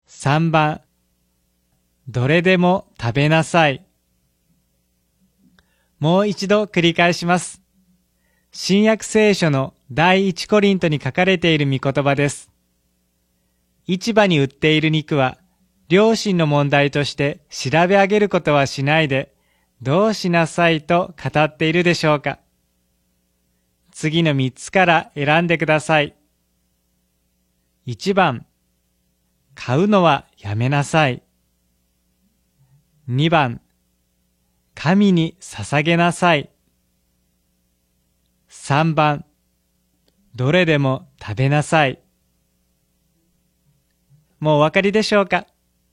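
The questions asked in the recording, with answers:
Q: 市場に売っている肉は、良心の問題として調べ上げることはしないで、どうしなさいと語っているでしょうか。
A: 3: どれでも食べなさい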